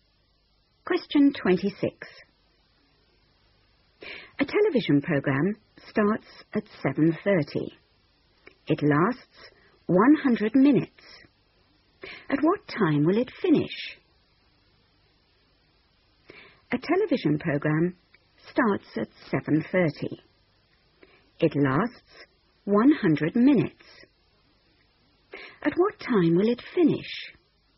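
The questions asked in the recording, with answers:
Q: It lasts 100 minutes. At what time will it finish?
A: 9:10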